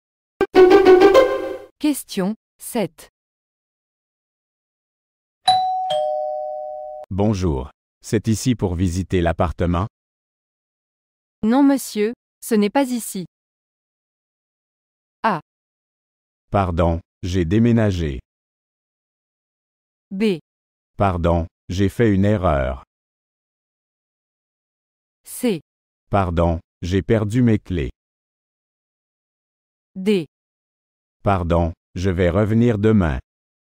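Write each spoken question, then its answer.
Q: Bonjour, c'est ici pour visiter l'appartement? Non, monsieur, ce n'est pas ici.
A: B: Pardon, j'ai fait une erreur.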